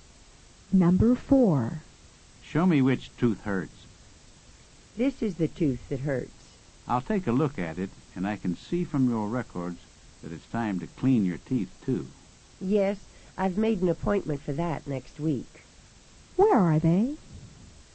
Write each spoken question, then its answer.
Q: Where are they?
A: They are at a dentist's office.